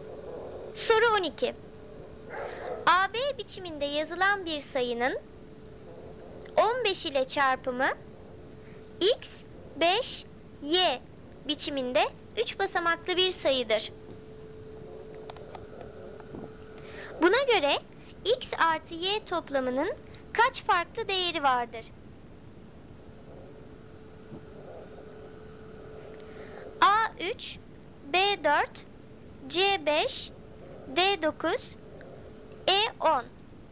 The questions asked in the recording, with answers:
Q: Buna göre x artı y toplamının kaç farklı değeri vardır?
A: Doğru cevap C 5.